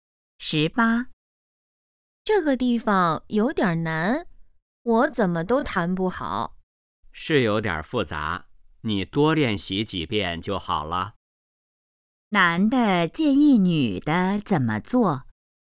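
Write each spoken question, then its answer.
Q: 男的建议女的怎么做?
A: 多练习几遍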